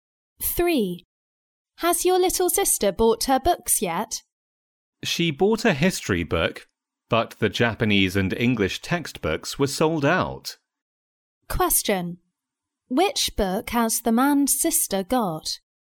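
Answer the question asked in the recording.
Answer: A history book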